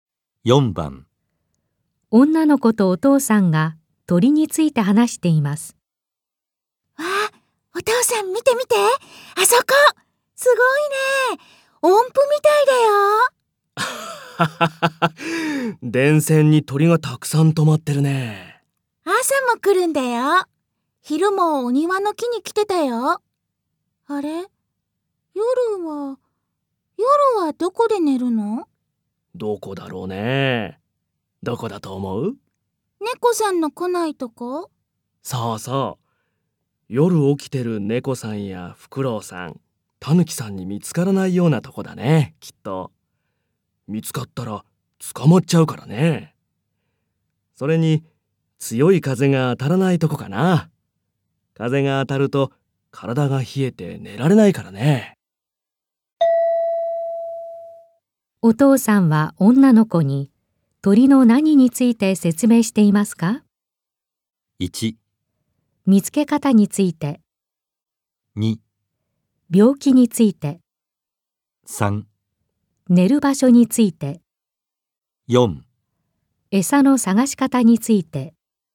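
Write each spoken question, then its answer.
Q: お父さんは女の子に鳥の何について説明していますか?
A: 3: 寝る場所について。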